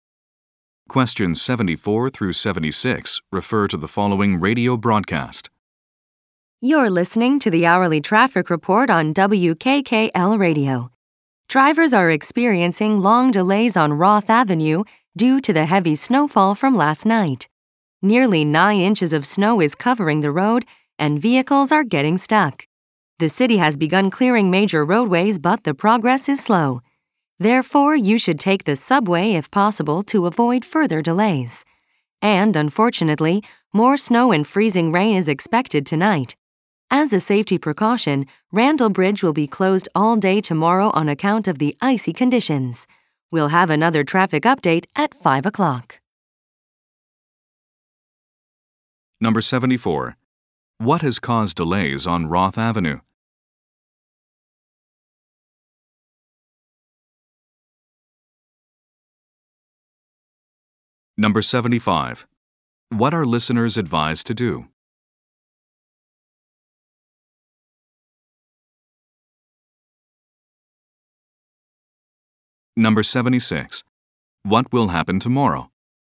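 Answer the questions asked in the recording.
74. Heavy snowfall
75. Take the subway
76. Randall Bridge will be closed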